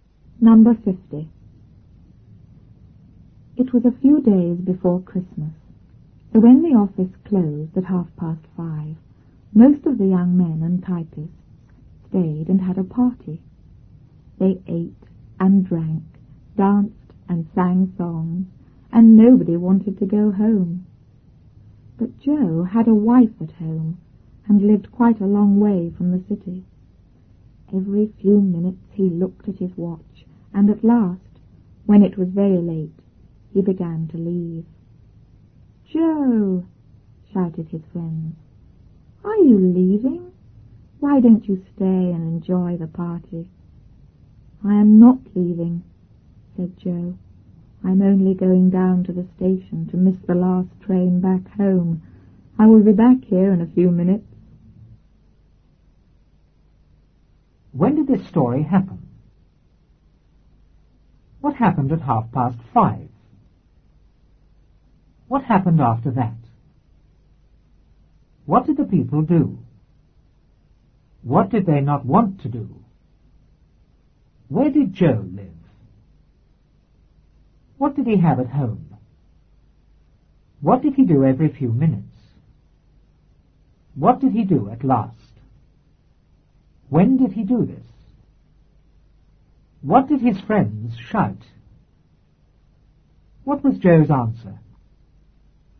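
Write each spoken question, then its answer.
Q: When did this story happen?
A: A few days before Christmas

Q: What happened at 5:30?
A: The office closed

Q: What happened after that?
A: Most of the young men and typists stayed and had a party

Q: What did the people do?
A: They ate and drank, danced and sang songs

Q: What did they not want to do?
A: Go home

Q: Where did Joe live?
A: Quite a long way from the city

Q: What did he have at home?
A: A wife

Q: What did he do every few minutes?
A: He looked at his watch

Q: What did he do at last?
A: He began to leave

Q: When did he do this?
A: When it was very late

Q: What did his friends shout?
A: "Joe, are you leaving? Why don't you stay and enjoy the party?"

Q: What was Joe's answer?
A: He wasn't leaving; he was only going to the station to miss the last train home and would be back in a few minutes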